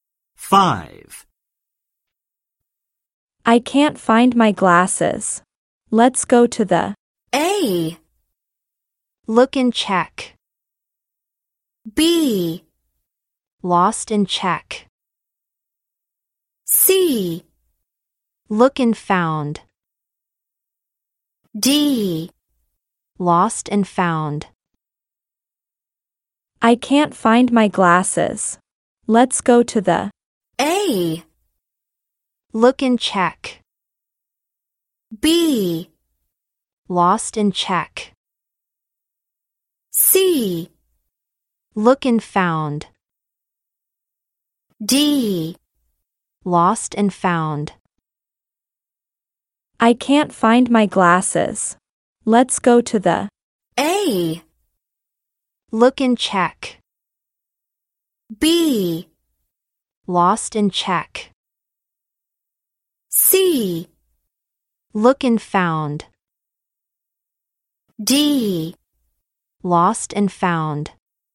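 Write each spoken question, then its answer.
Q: I can't find my glasses. Let's go to the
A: D: Lost and found.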